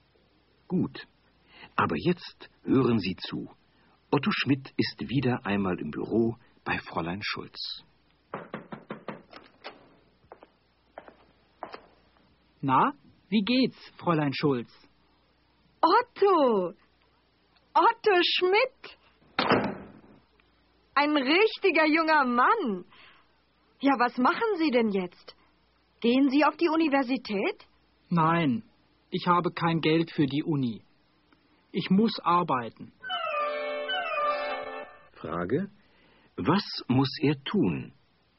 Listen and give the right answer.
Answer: Er muss arbeiten.